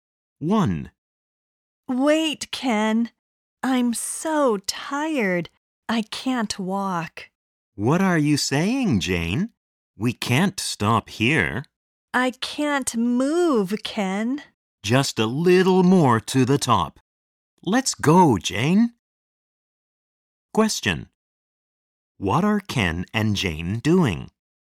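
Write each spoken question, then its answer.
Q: What are Ken and Jane doing?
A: They are climbing a mountain.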